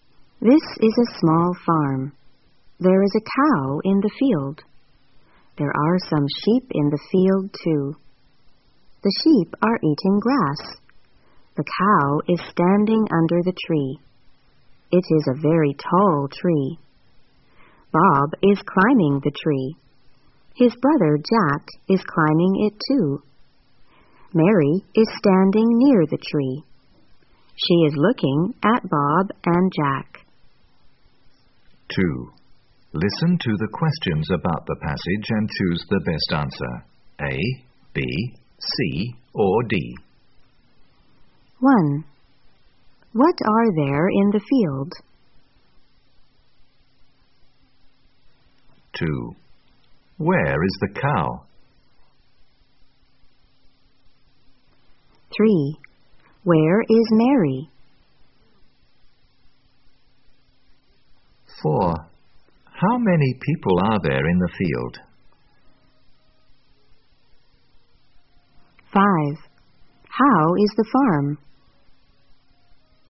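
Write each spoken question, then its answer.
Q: What are there in the field?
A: A cow and some sheep

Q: Where is the cow?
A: Under the tree

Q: Where is Mary?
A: Near the tree

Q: How many people are there in the field?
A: Three

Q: How is the farm?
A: It is small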